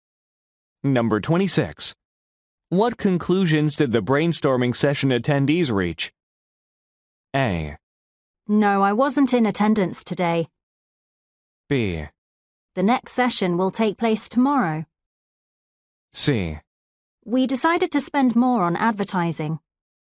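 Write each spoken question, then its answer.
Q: What conclusions did the brainstorming session attendees reach?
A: C: We decided to spend more on advertising.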